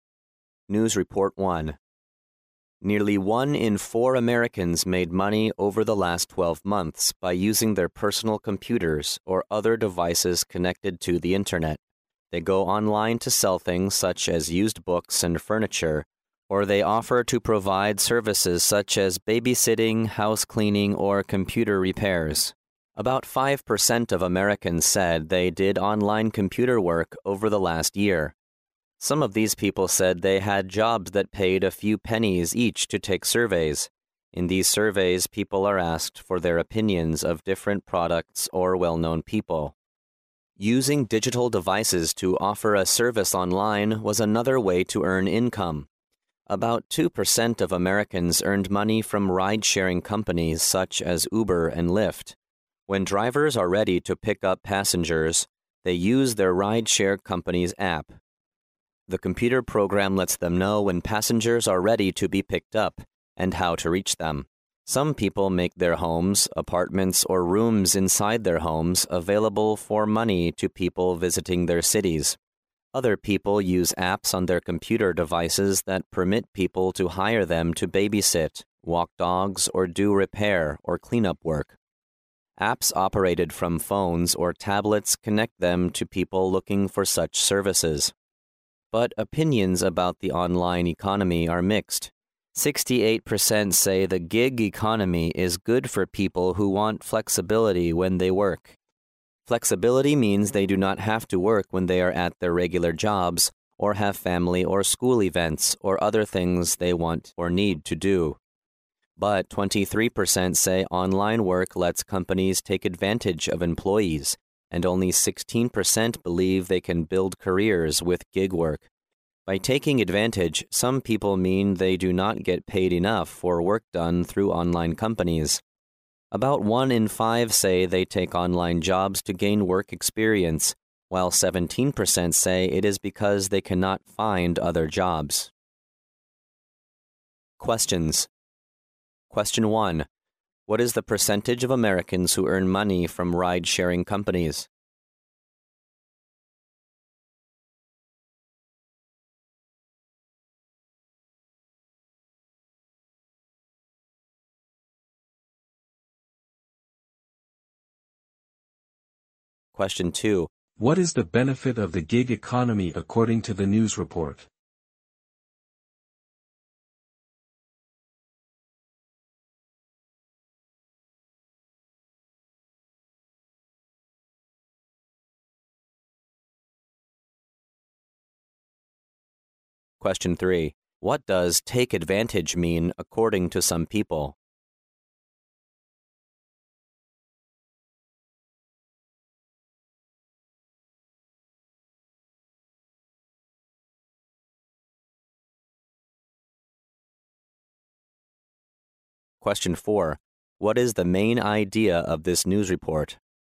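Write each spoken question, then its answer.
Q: What is the percentage of Americans who earn money from ride-sharing companies?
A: About 2%

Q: What is the benefit of the gig economy according to the news report?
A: Flexibility when people work

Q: What does take advantage mean according to some people?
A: Not getting paid enough for online work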